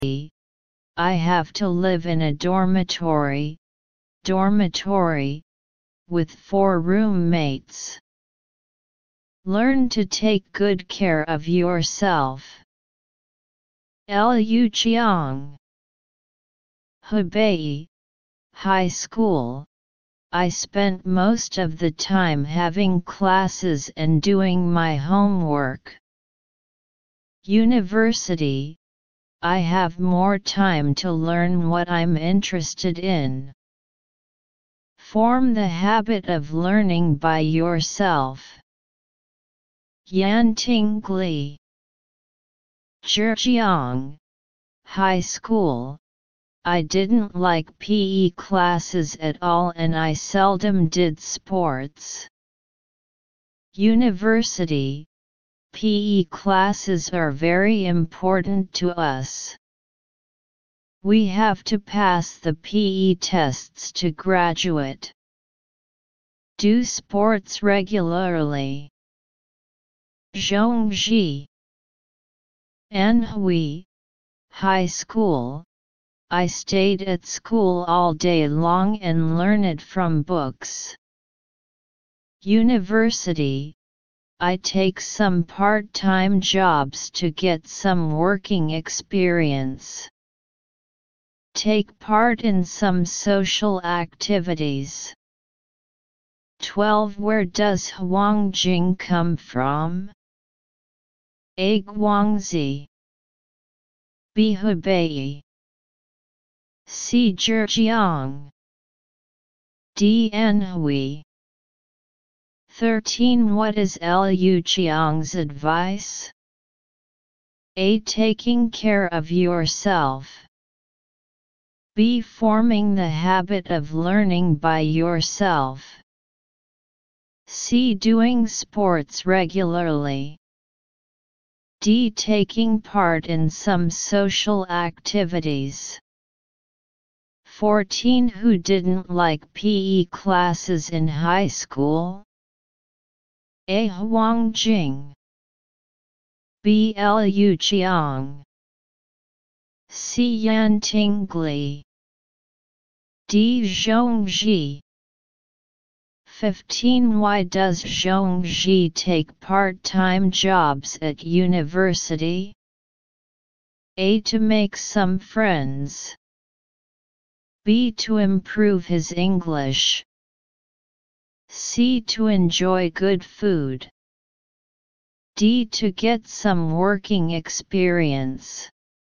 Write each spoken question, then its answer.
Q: What is Liu Qiang's advice?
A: 13. B.

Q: Who didn't like PE classes in high school?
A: 14. C.

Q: Why does Zhongji take part-time jobs at university?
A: 15. D.